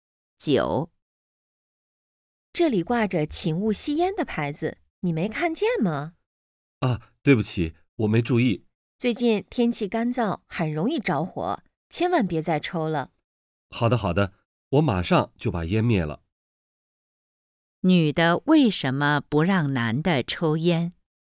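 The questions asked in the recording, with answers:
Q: 女的为什么不让男的抽烟?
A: 天气干燥,容易着火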